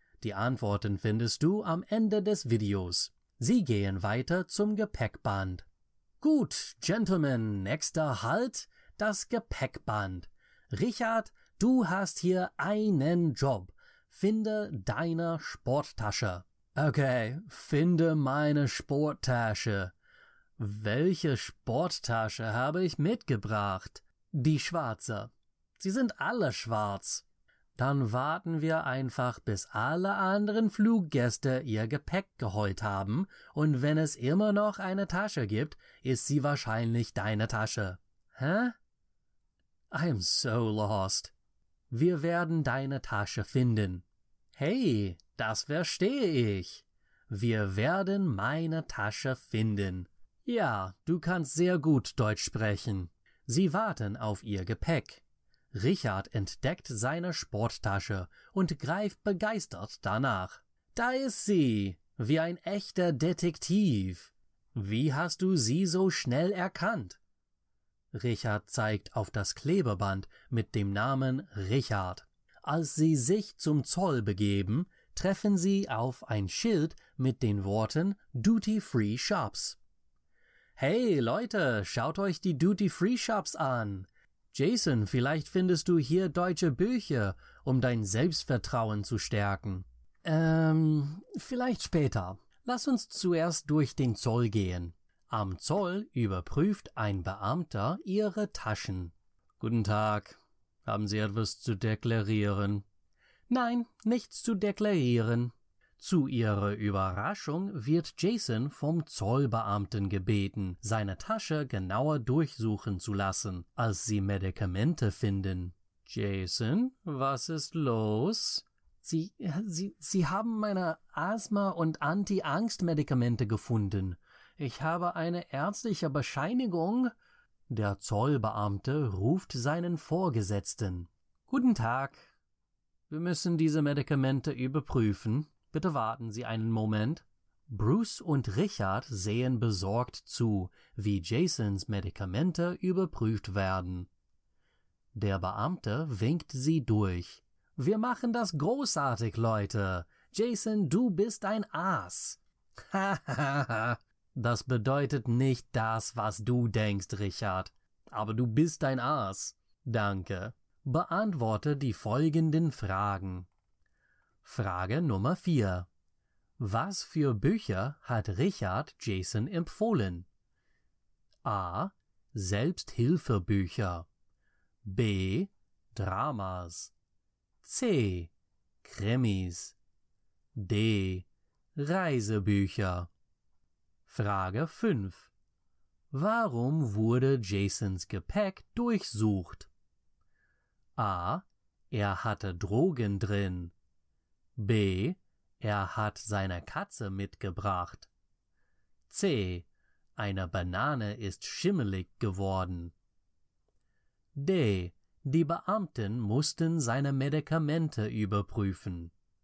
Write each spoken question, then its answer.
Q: Was für Bücher hat Richard Jason empfohlen?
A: Die richtige Antwort ist A.

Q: Warum wurde Jasons Gepäck durchsucht?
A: Die richtige Antwort ist D.